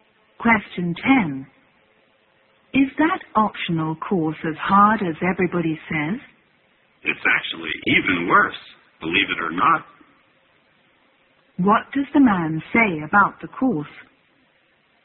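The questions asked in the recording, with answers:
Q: What does the man say about the course?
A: It is even harder than everybody says.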